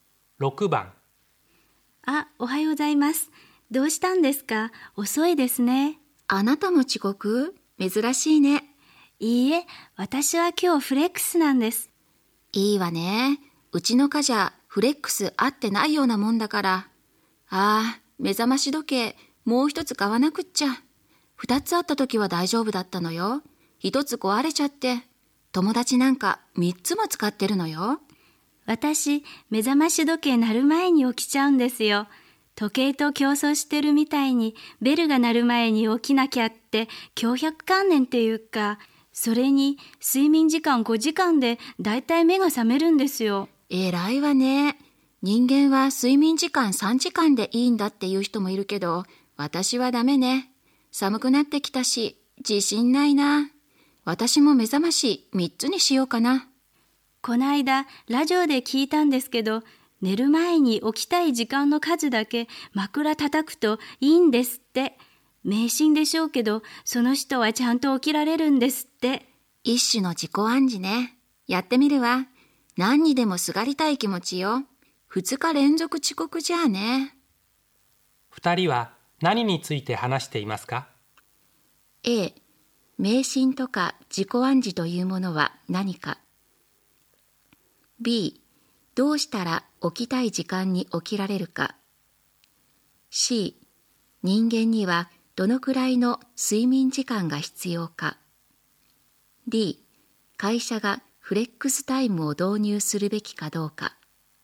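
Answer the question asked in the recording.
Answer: B: どうしたら起きたい時間に起きられるか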